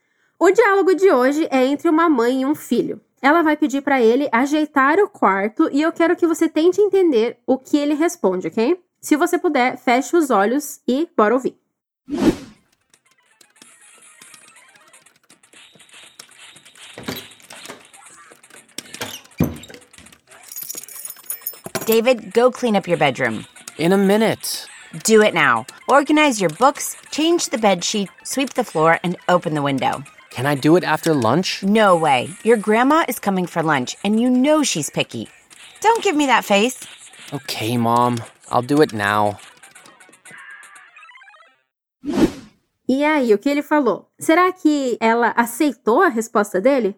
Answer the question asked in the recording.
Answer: Ele responde simplesmente: Ok, mom, I'll do it now.